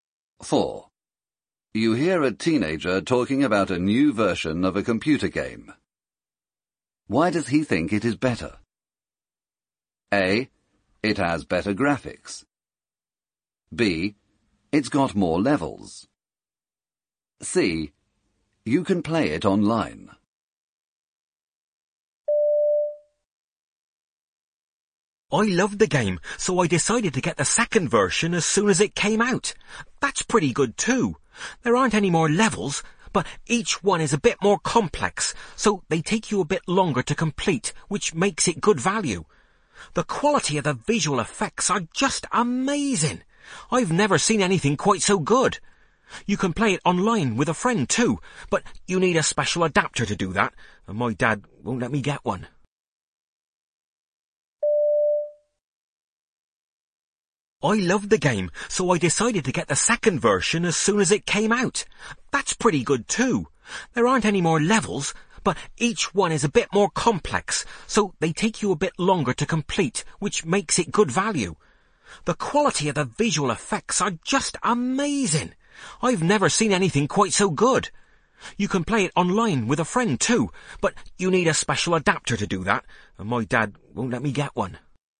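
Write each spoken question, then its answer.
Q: Why does he think it is better?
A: A: It has better graphics.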